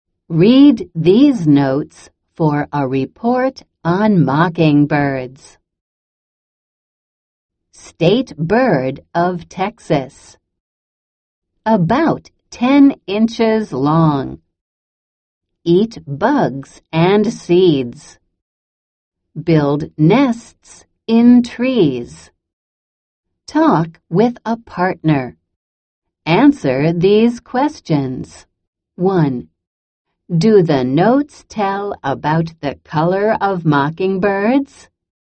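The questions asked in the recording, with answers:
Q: Do the notes tell about the color of mockingbirds?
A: No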